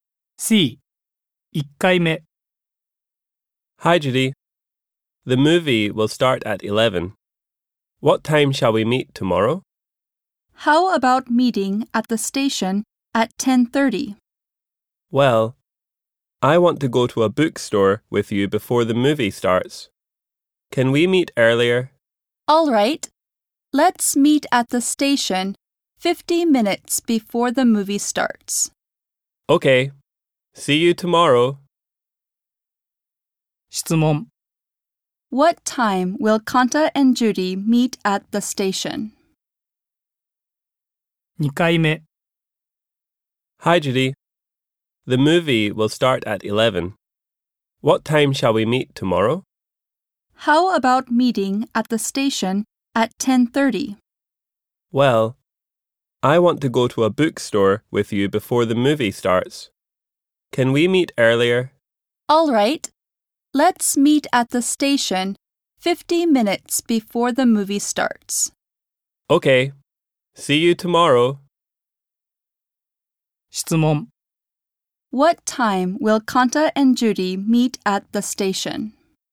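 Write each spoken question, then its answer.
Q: What time will Kanta and Judy meet at the station?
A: At 10:10.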